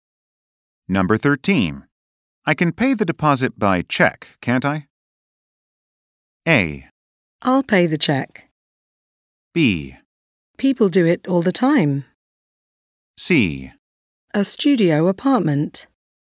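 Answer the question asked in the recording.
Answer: B: People do it all the time.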